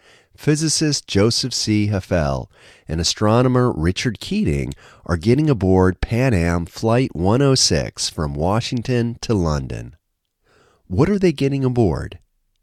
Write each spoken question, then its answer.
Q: What are they getting aboard?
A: They are getting aboard Pan Am Flight 106.